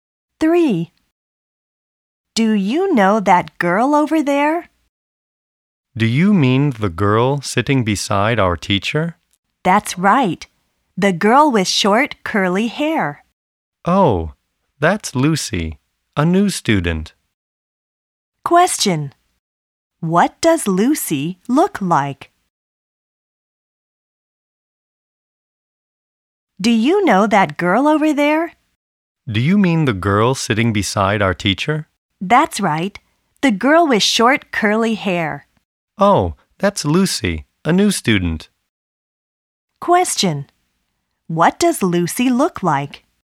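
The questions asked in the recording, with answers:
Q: What does Lucy look like?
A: She has short, curly hair.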